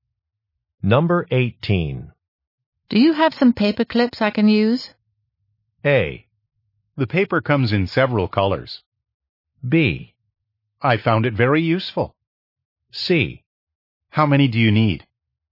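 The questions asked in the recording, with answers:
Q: Do you have some paper clips I can use?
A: C: How many do you need?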